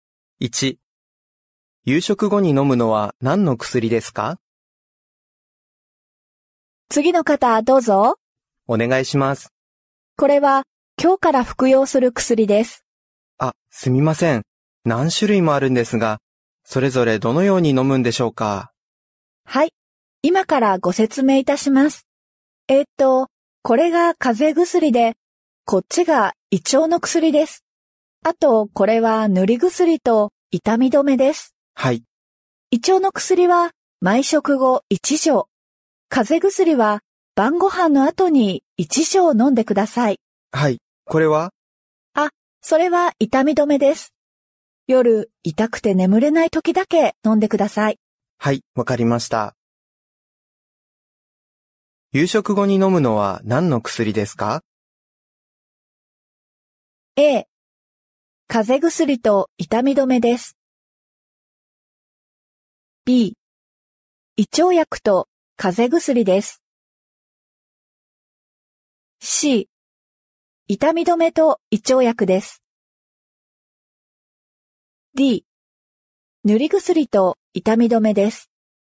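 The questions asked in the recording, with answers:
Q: 夕食後に飲むのは何の薬ですか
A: B: 胃腸薬と風邪薬です。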